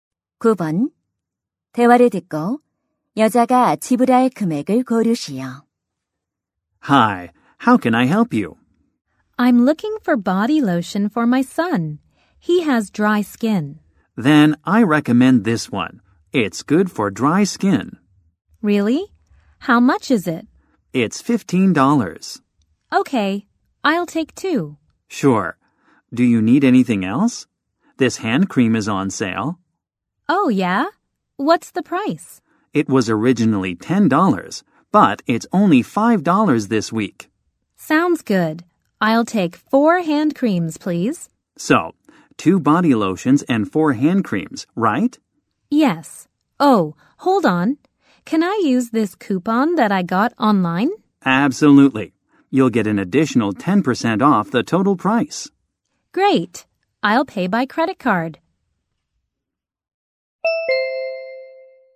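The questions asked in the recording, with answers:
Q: 대화를 듣고 여자가 지불할 금액을 고르시오.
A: $45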